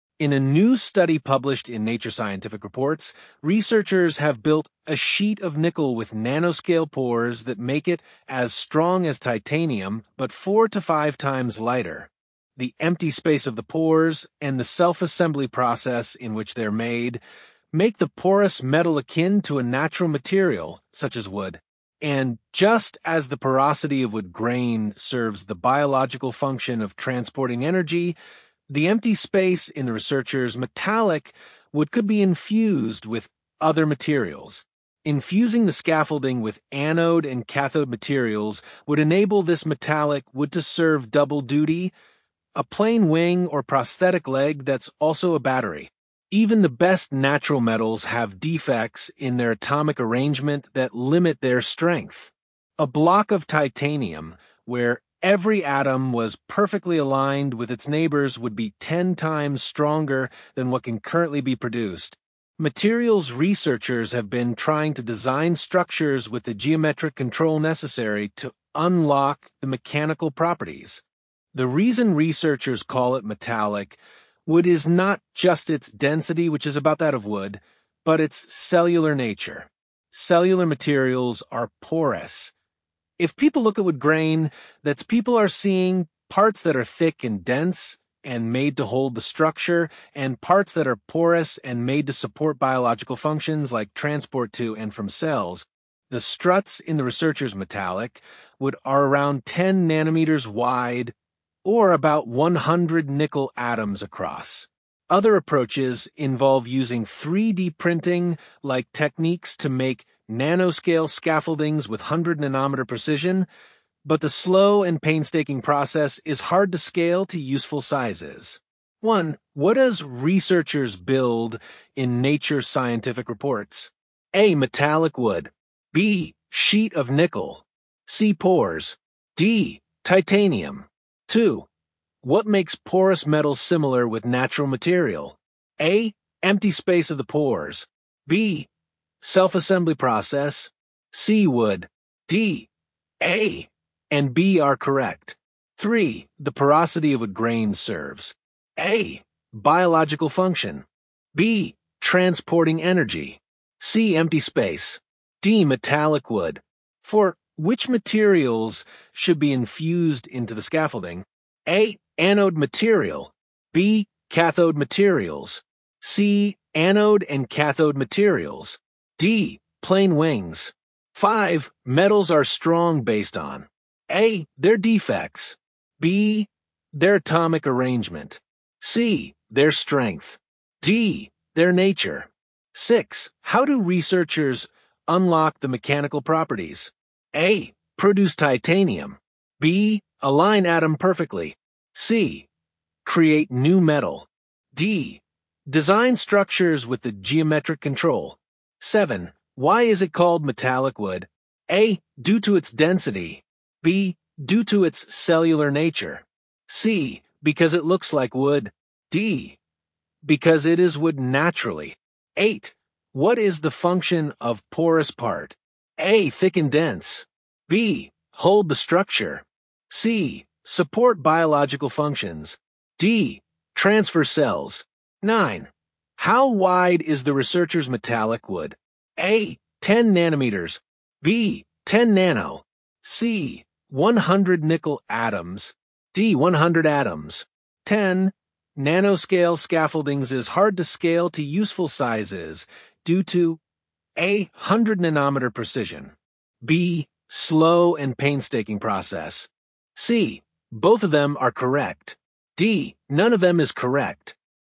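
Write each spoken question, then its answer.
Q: What does researchers build in Nature Scientific Reports?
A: B: Sheet of nickel.

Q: What makes porous metal similar with natural material?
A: D: A. and B are correct.

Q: Which materials should be infused into the scaffolding?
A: C: Anode and cathode materials.

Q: Metals are strong based on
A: B: their atomic arrangement.

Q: How do researchers unlock the mechanical properties?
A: D: Design structures with the geometric control.

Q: What is the function of porous part?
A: C: Support biological functions.

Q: Nanoscale scaffoldings is hard to scale to useful sizes due to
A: B: Slow and painstaking process.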